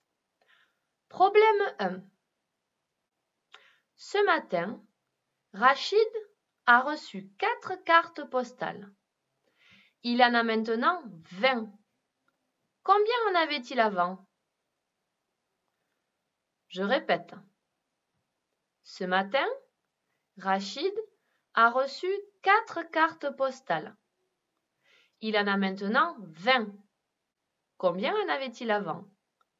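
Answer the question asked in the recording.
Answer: 16 cartes postales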